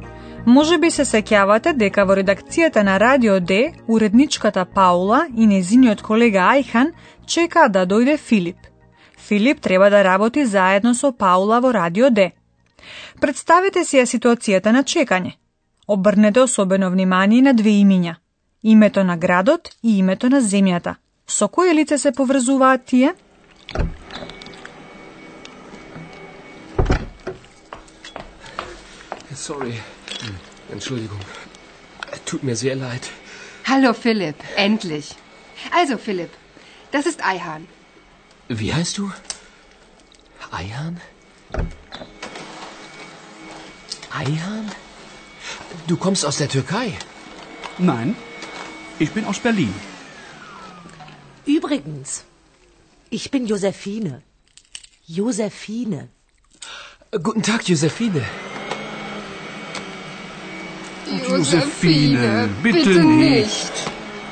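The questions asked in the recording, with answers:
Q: Со кој лице се поврзуваат тие?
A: Со Ајхан (Берлин и Турција)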